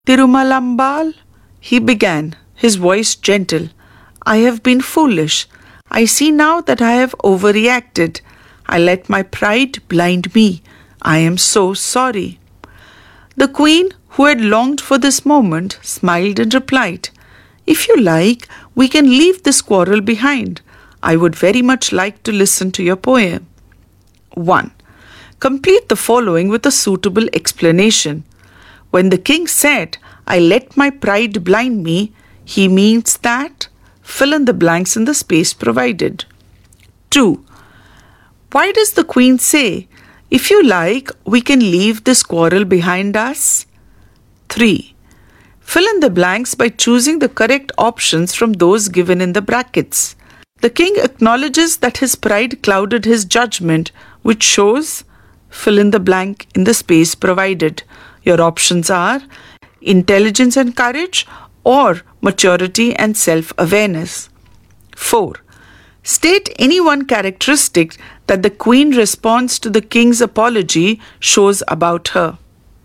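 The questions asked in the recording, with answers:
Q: The king acknowledges that his pride clouded his judgment, which shows, fill in the blank in the space provided.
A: maturity and self-awareness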